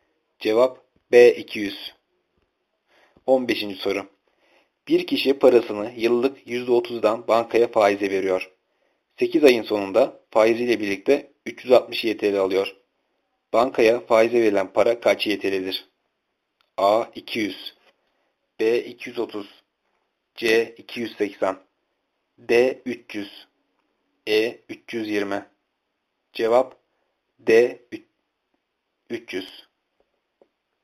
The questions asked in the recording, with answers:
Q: Bankaya faize verilen para kaç YTL'dir?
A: Cevap D 300.